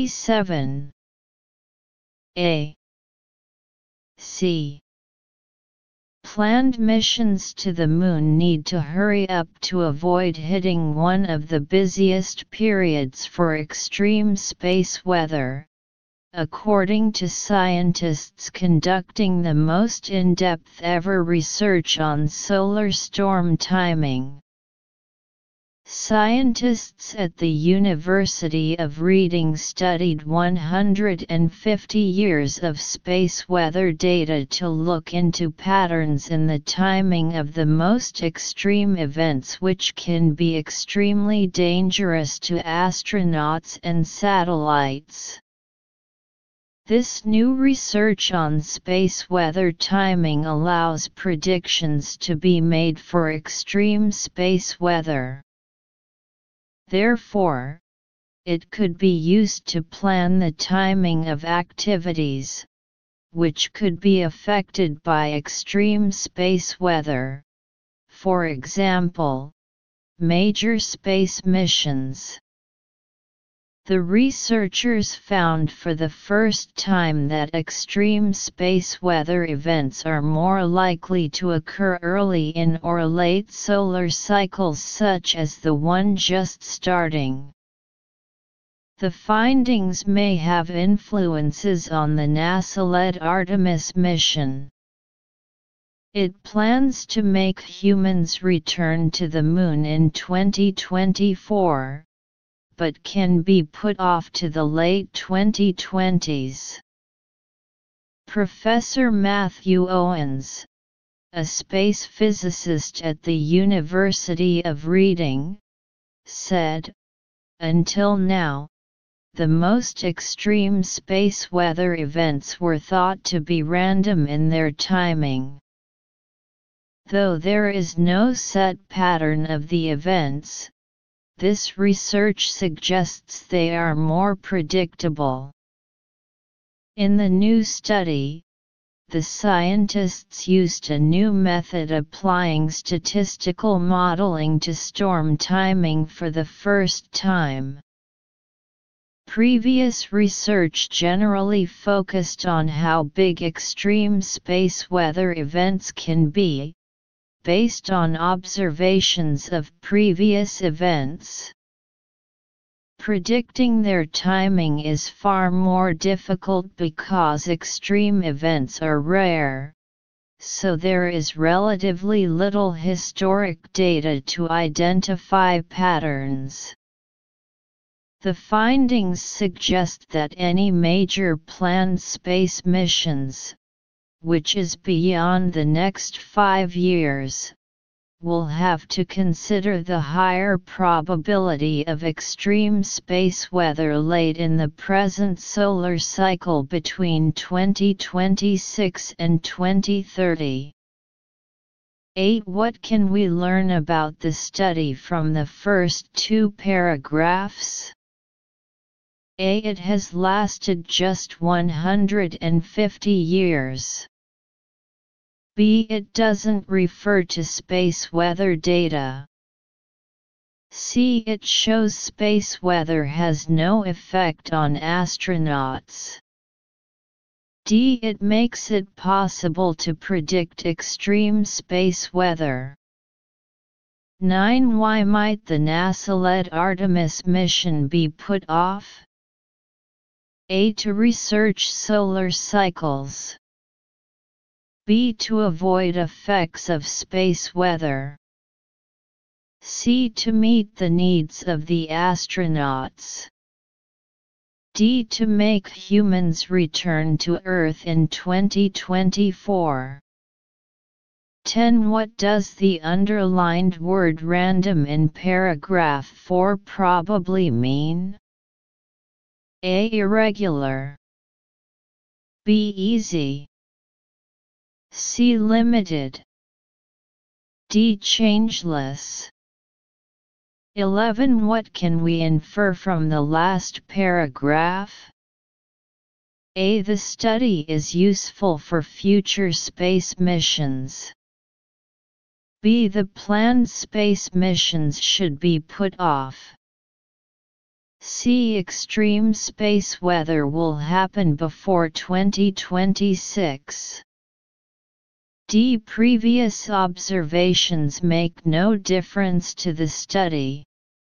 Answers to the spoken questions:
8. 8. D.
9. 9. B.
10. 10. A.
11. 11. A.